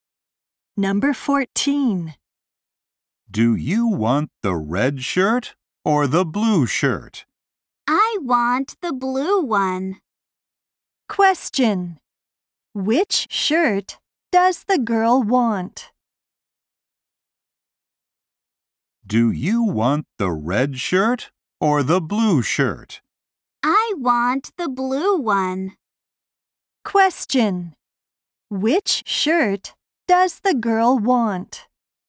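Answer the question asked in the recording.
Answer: The blue one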